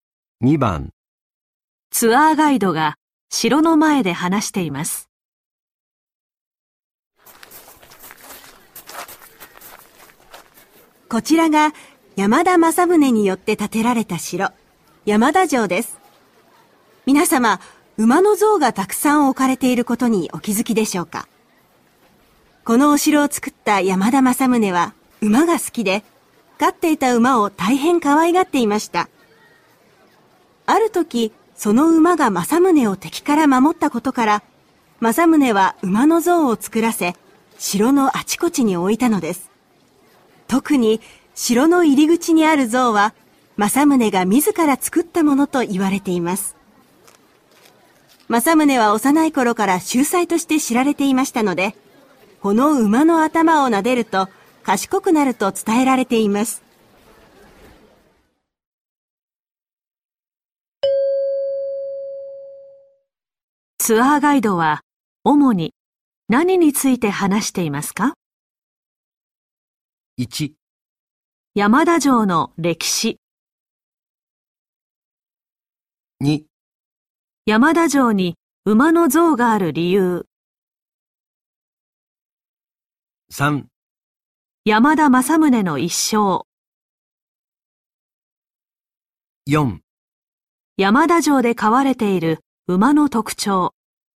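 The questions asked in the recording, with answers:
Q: ツアーガイドは主に何について話していますか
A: 2: 山田城に馬の像がある理由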